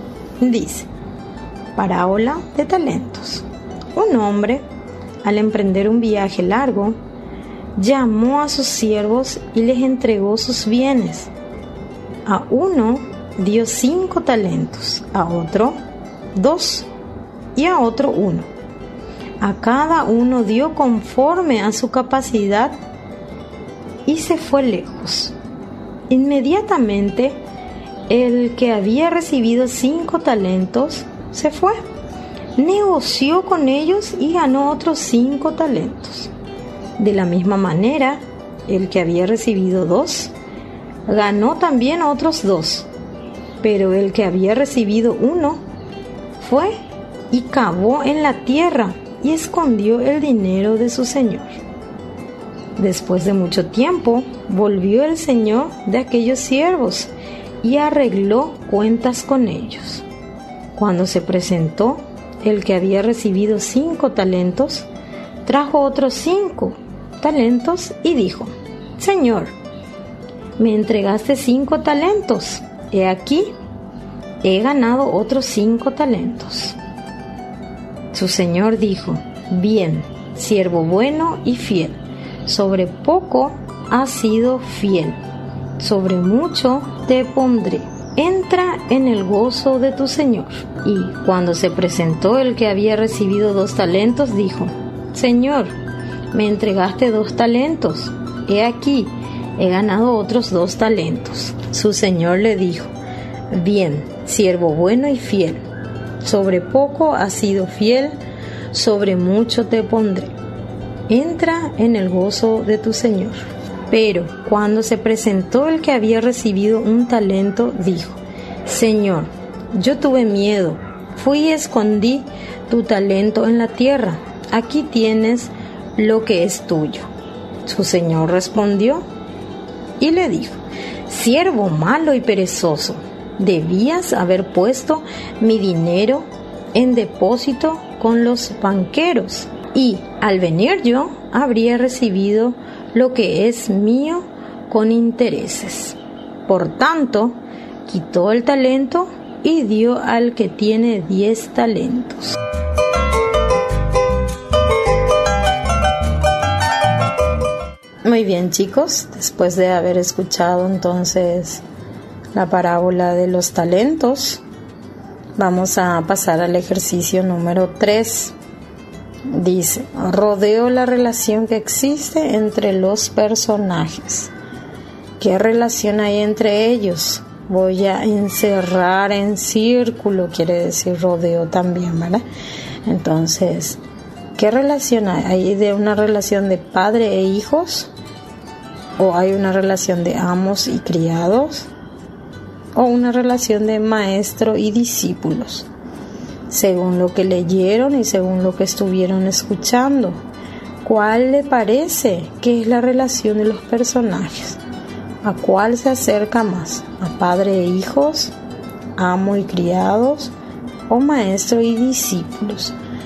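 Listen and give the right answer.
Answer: amos y criados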